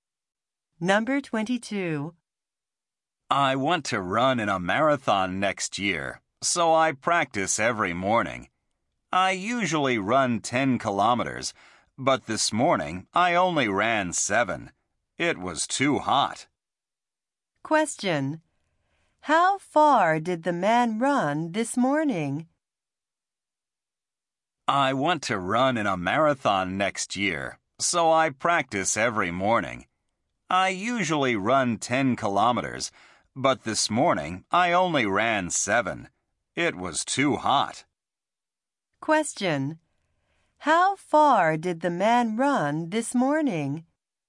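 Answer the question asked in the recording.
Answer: 7 kilometers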